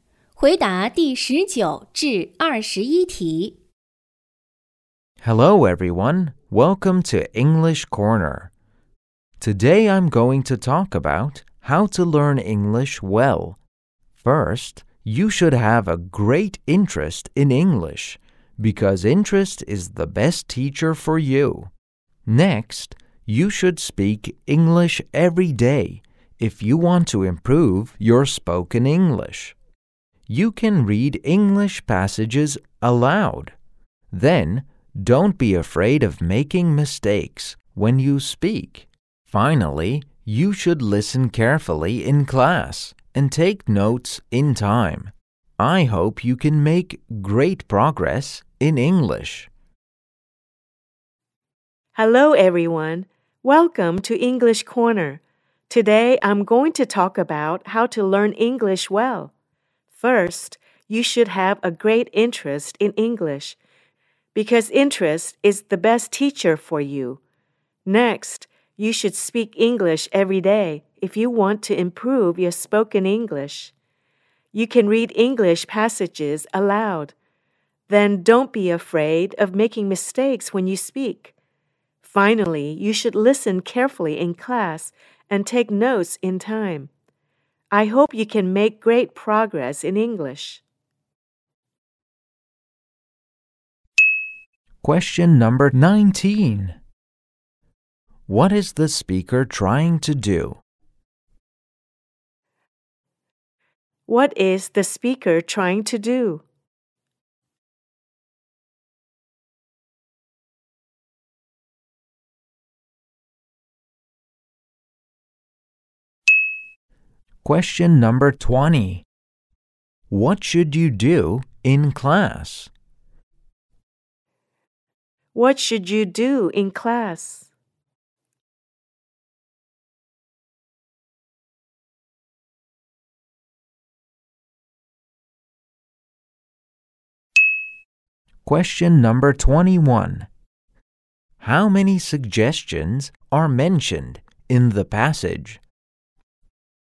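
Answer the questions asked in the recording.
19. Give advice on how to learn English well
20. Listen carefully and take notes in time
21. Four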